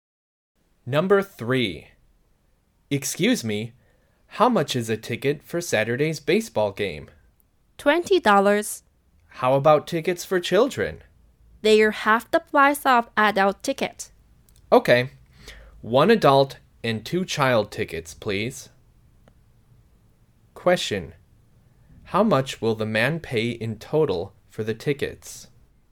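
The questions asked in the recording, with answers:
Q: Question: How much will the man pay in total for the tickets?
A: $40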